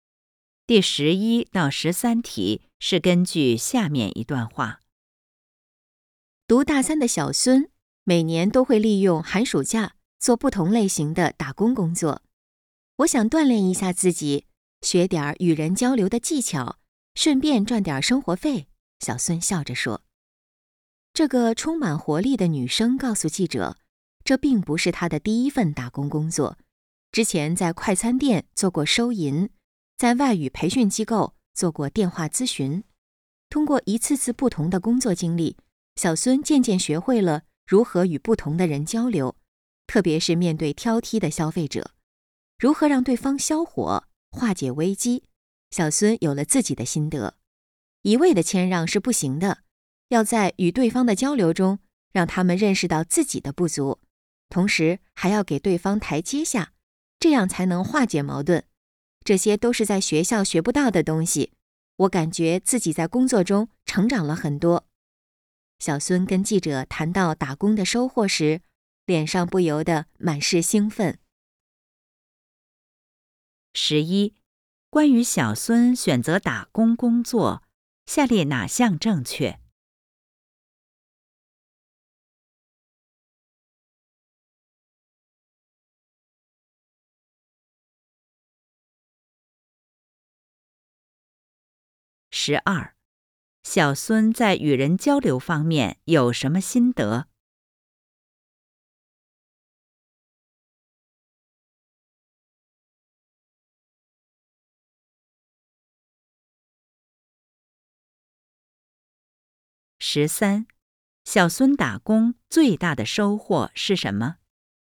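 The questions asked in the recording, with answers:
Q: 小孙在与人交流方面有什么心得?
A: 不能一味谦让,要让对方认识到自己的不足,同时给对方台阶下

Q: 小孙打工最大的收获是什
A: 学到了学校学不到的东西,在工作中成长了很多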